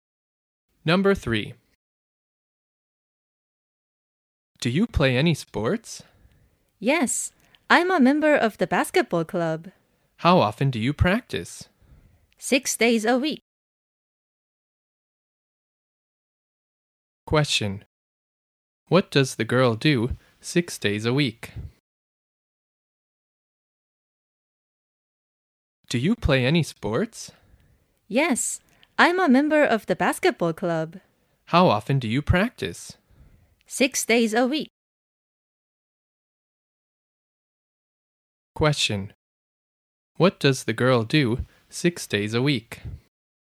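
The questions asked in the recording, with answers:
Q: What does the girl do 6 days a week?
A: She practices basketball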